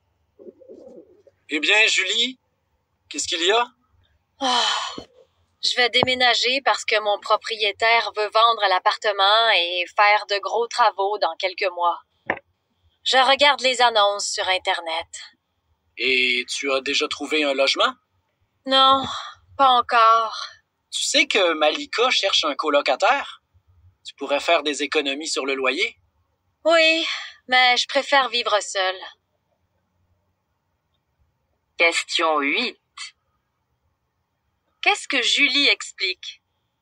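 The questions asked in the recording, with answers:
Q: Qu'est-ce que Julie explique?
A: Elle va déménager parce que son propriétaire veut vendre l'appartement et faire de gros travaux.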